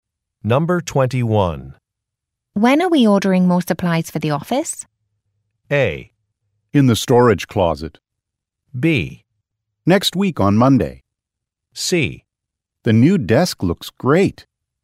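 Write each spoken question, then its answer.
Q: When are we ordering more supplies for the office?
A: B: Next week on Monday.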